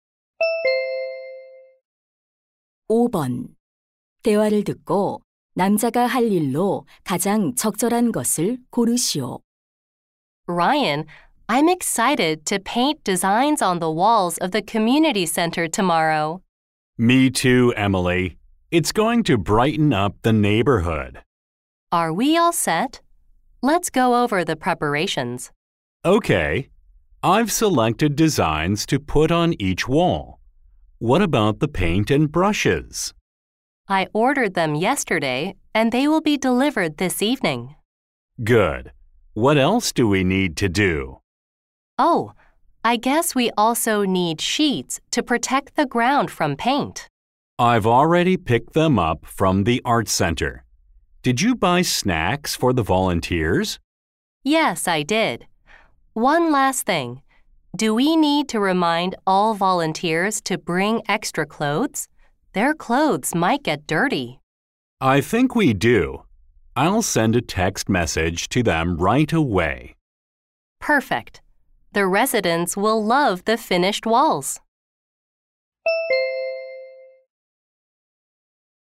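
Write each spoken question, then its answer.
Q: 대화를 듣고 남자가 할 일로 가장 적절한 것을 고르시오.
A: 자원봉사자들에게 여벌 옷을 가져오라고 문자 보내기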